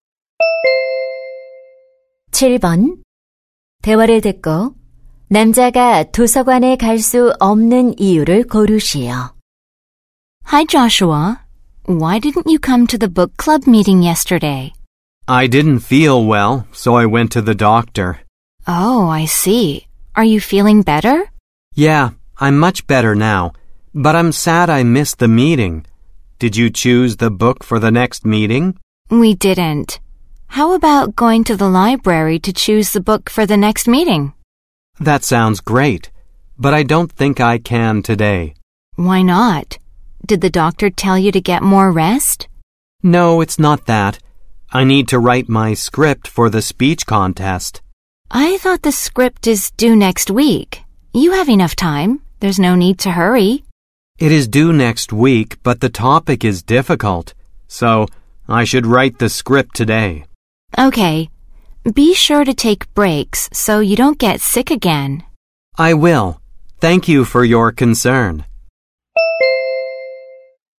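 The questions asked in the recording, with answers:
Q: 대화를 듣고 남자가 도서관에 갈 수 없는 이유를 고르시오.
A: 말하기 대회 원고를 써야 해서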